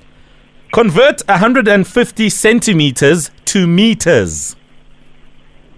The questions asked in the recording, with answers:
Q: Convert 150 centimeters to meters.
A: 1.5 meters.